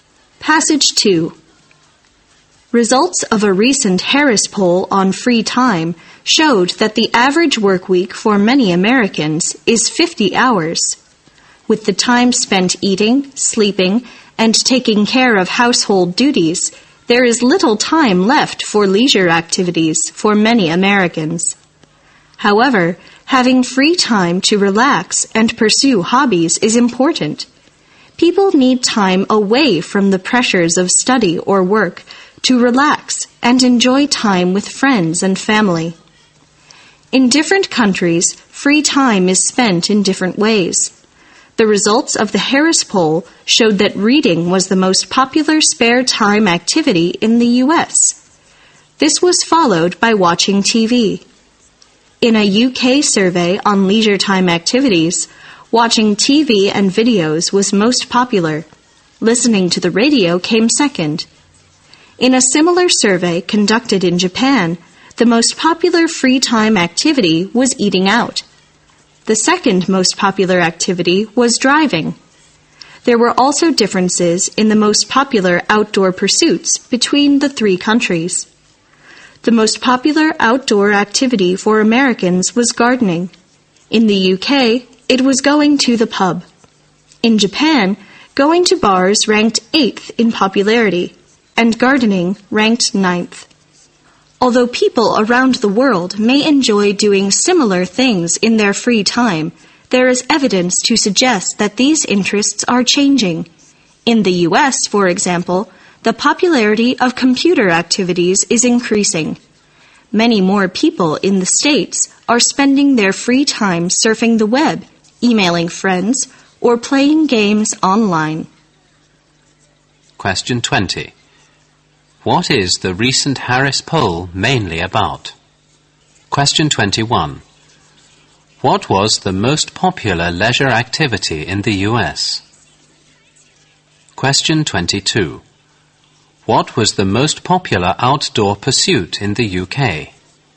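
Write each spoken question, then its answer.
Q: What is the recent Harris poll mainly about?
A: Free time (leisure activities)

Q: What was the most popular leisure activity in the US?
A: Reading

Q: What was the most popular outdoor pursuit in the UK?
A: Going to the pub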